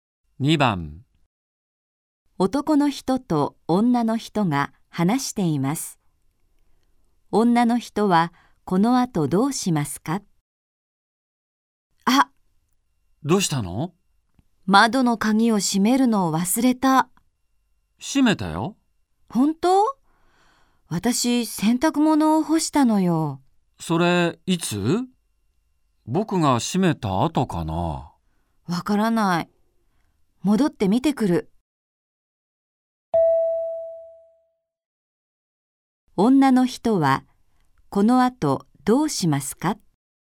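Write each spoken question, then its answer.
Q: 女の人はこの後どうしますか?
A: 家に戻って窓の鍵が閉まっているか見てくる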